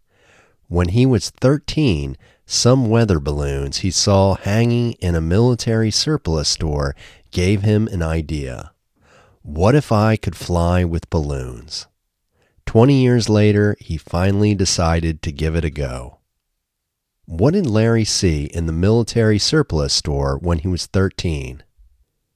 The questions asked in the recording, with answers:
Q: What did Larry see in the military surplus store when he was 13?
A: He saw some weather balloons hanging in a military surplus store when he was 13.